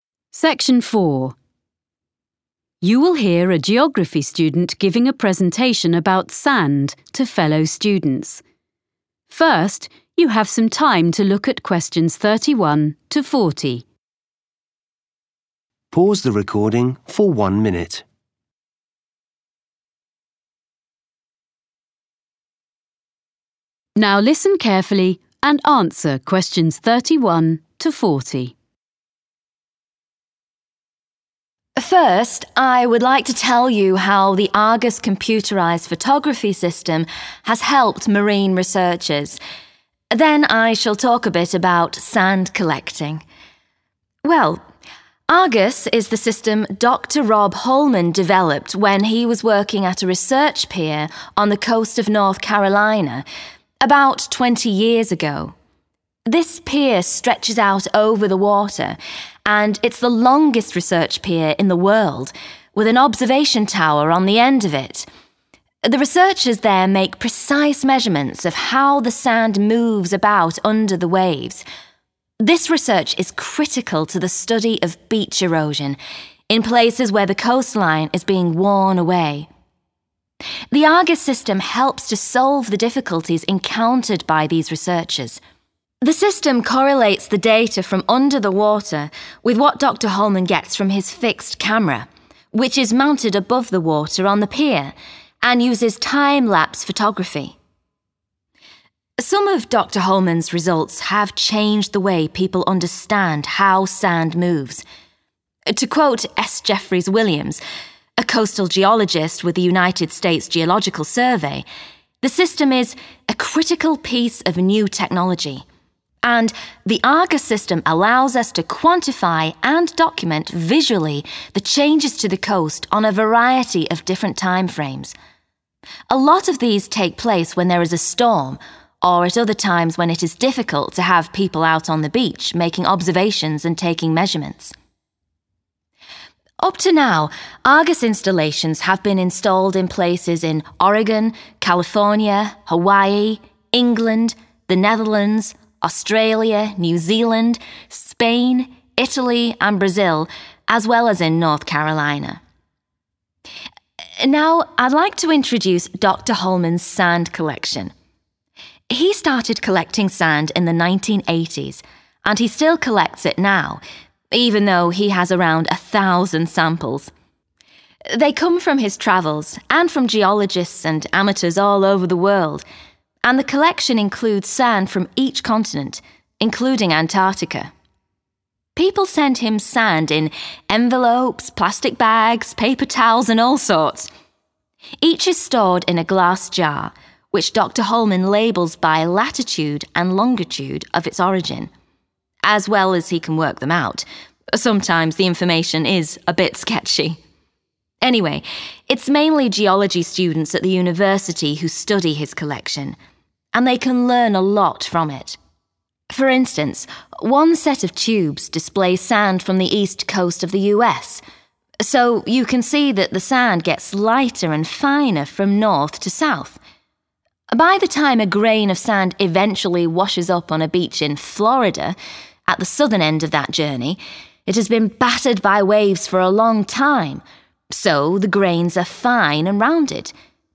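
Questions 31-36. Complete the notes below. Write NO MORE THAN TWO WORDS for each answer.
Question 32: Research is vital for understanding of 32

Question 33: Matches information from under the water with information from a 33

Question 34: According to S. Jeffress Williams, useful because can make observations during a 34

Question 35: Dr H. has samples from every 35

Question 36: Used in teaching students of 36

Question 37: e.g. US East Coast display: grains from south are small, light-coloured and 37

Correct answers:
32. beach erosion
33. fixed camera
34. storm
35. continent
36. geology
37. rounded

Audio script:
First, I would like to tell you how the Argus computerized photography system has helped marine researchers. Then I shall talk a bit about sand collecting.
Well, Argus is the system Doctor Rob Holman developed when he was working at a research pier on the coast of North Carolina about 20 years ago.
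This pier stretches out over the water, and it's the longest research pier in the world, with an observation tower on the end of it. The researchers there make precise measurements of how the sand moves about under the waves. (Q31) This research is critical to the study of (= research is vital for understanding of) beach erosion in places where the coastline is being worn away.
The Argus system helps to solve the difficulties encountered by these researchers.
Some of Doctor Holman's results have changed the way people understand how sand moves. To quote S. Jeffress Williams, a coastal geologist with the United States Geological Survey, the system is 'a critical piece of new technology' and (Q33) 'The Argus system allows us to quantify and document visually (= make observations) the changes to the coast on a variety of different time frames. Rất nhiều trong số này diễn ra khi có một cơn bão] or at other times when it is difficult to have people out on the beach making observations and taking measurements.'
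Up to now Argus installations have been installed in places in Oregon, California, Hawaii, England, the Netherlands, Australia, New Zealand, Spain, Italy and Brazil, as well as in North Carolina.
Now I'd like to introduce Dr Holman's sand collection. He started collecting sand in the 1980s, and he still collects it now, even though he has around a thousand samples. They come from his travels and from geologists and amateurs all over the world – and (Q34) the collection includes sand from each continent, including Antarctica.
People send him sand in envelopes, plastic bags, paper towels and all sorts! Each is stored in a glass jar, which Dr Holman labels by latitude and longitude of its origin, as well as he can work them out – sometimes the information is a bit sketchy!
For instance, one set of tubes displays sand from the East Coast of the US. So you can see that the sand gets lighter and finer from north to south. 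By the time a grain of sand eventually washes up on a beach in Florida (Q36) at the southern end of that journey, it has been battered by waves for a long time so the grains are fine and rounded [ở đầu phía nam của hành trình, lâu ngày được sóng vỗ nên hạt mẩy, căng tròn] because most of the time sand is not stationary on the beach.
OK, so if you'd like to collect sand and maybe even send some to Dr Holman, How should you go about it? Well, the list of equipment is very short and easy to find, but you should keep a supply when you're travelling, as you never know when you'll come across an interesting sand sample.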